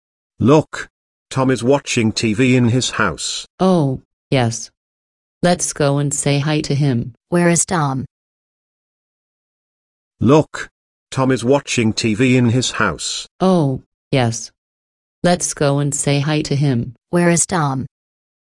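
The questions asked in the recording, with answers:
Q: Where is Tom?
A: In his house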